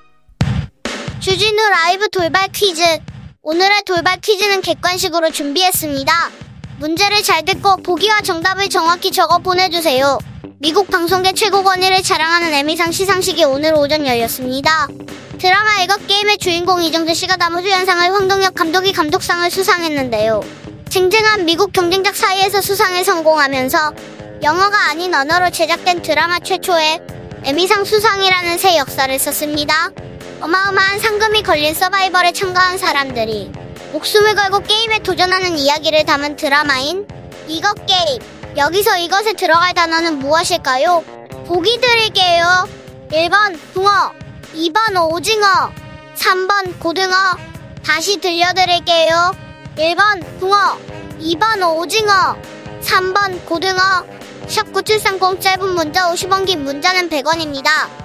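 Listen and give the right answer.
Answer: 2번: 오징어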